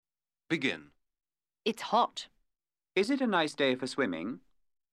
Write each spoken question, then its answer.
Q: Is it a nice day for swimming?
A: Yes, it is.